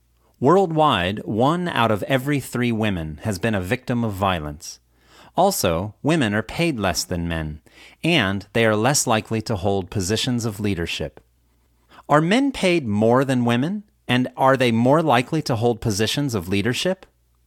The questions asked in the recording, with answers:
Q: Are men paid more than women, and are they more likely to hold positions of leadership?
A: Yes, men are paid more than women, and they are more likely to hold positions of leadership.